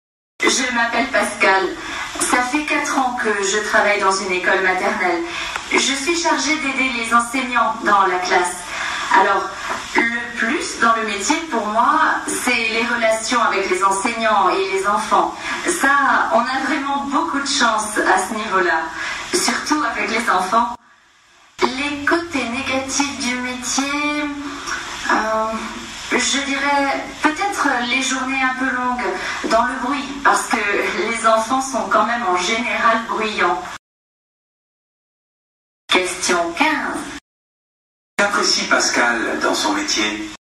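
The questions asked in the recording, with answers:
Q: Qu'apprécie Pascal dans son métier ?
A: Les relations avec les enseignants et les enfants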